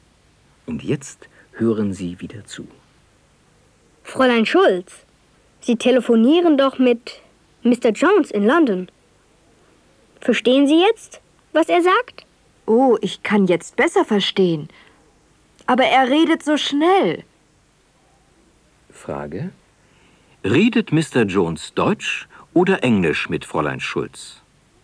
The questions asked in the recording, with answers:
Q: Redet Mr. Jones Deutsch oder Englisch mit Fräulein Schulz?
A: Er redet Englisch mit ihr.